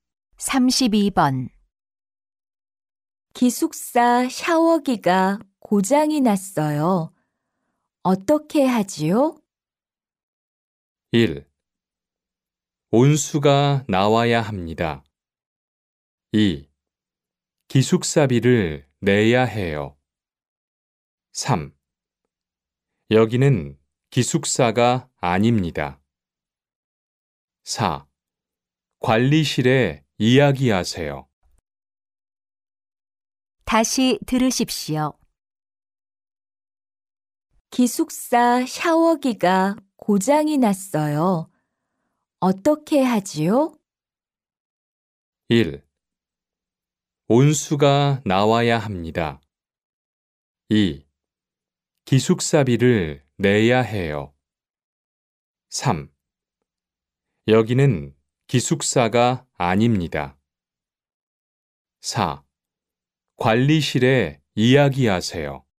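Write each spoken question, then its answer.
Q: 기숙사 샤워기가 고장이 났어요. 어떻게 하지요?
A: 4: 관리실에 이야기하세요.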